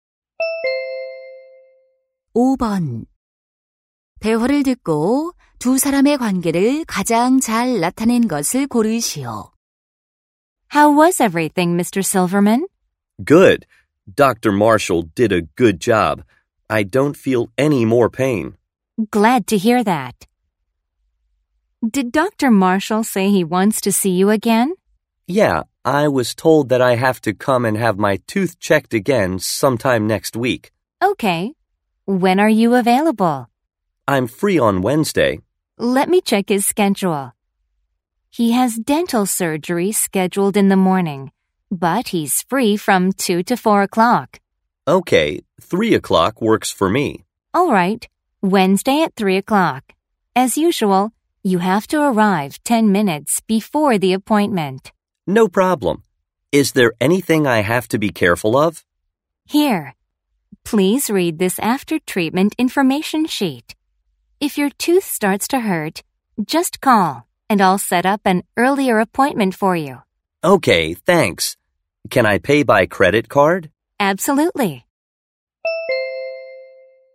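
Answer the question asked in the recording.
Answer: 치과 환자 - 치과 접수 직원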